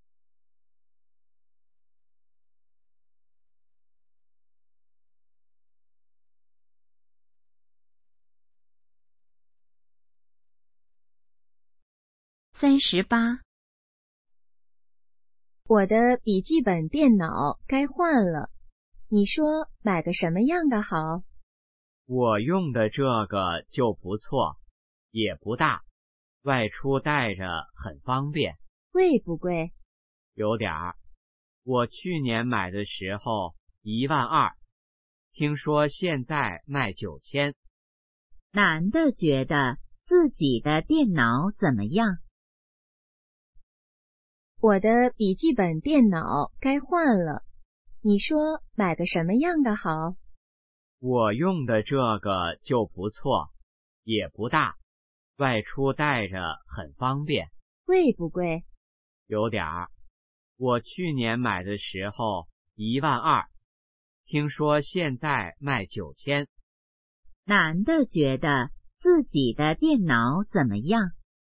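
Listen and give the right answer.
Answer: 不错,外出带着方便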